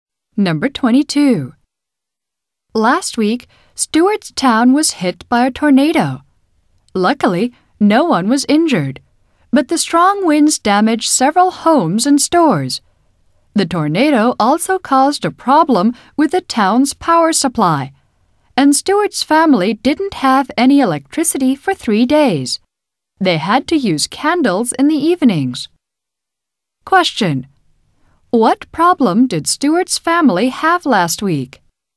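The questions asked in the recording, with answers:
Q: What problem did Stuart's family have last week?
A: They had no electricity for 3 days.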